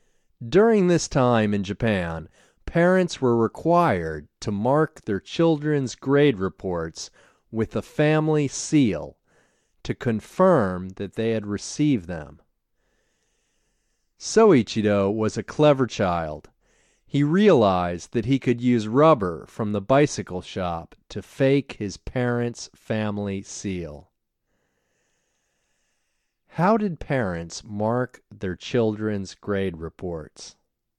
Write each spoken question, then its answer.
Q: How did parents mark their children's grade reports?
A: Parents marked their children's grade reports with the family seal.